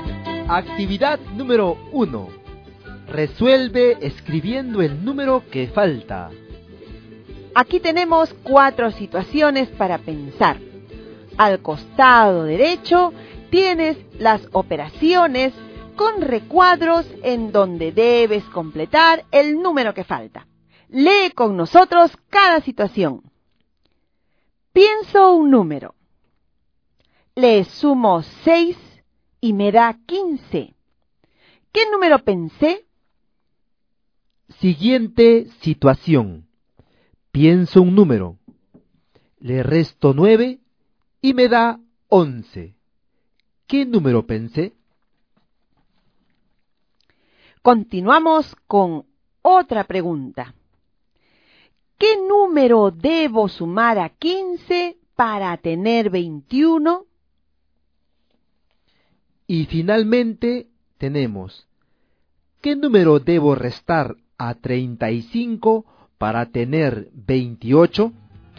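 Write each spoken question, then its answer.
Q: Pienso un número. Le resto 9 y me da 11. ¿Qué número pensé?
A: 20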